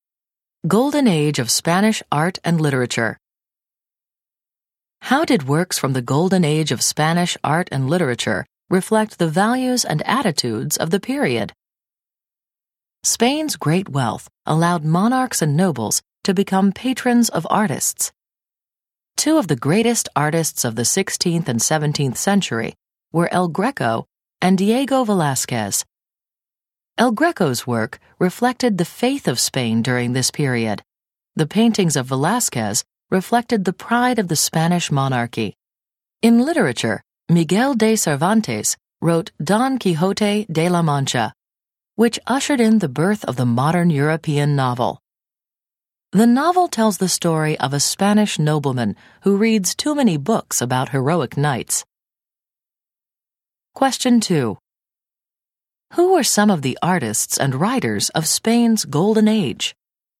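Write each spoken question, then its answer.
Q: Who were some of the artists and writers of Spain's Golden Age?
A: El Greco, Diego Velázquez and Miguel de Cervantes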